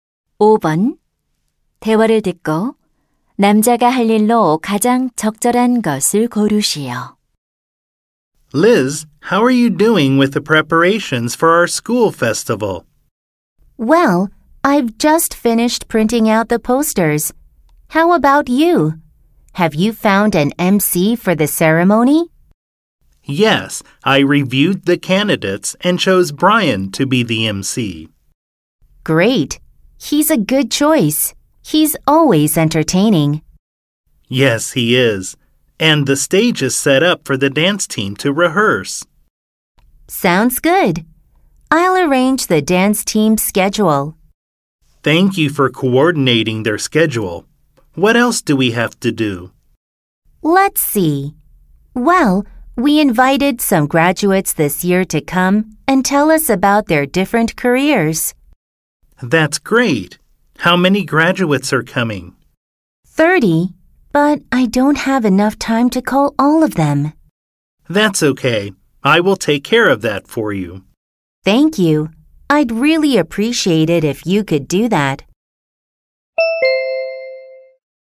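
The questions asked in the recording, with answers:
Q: 대화를 듣고 남자가 할 일로 가장 적절한 것을 고르시오.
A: 졸업생들에게 전화하기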